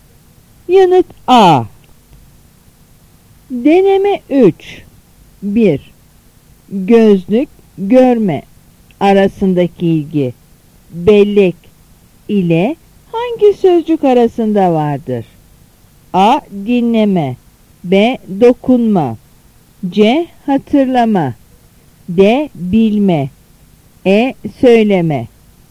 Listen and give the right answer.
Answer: Yanıt C.